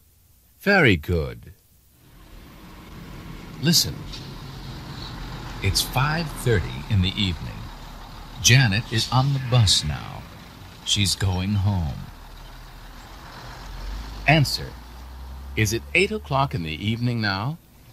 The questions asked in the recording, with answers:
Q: Is it 8 o'clock in the evening now?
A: No, it's not.